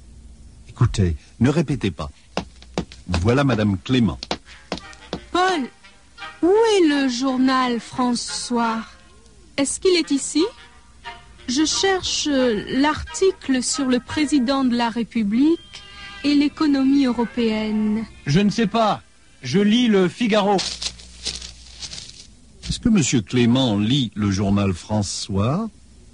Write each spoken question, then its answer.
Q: Est-ce que M. Clément lit le journal François?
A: Non, il ne lit pas le journal François.